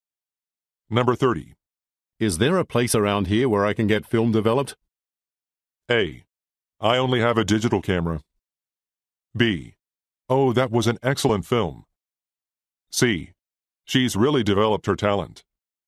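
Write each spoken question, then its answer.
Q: Is there a place around here where I can get film developed?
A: A: I only have a digital camera.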